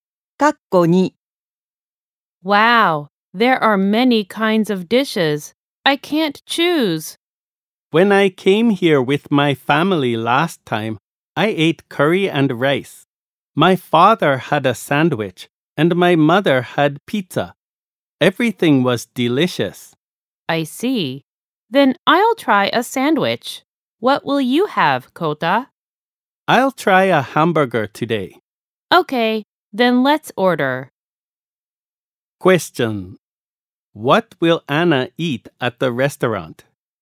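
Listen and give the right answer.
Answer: A sandwich.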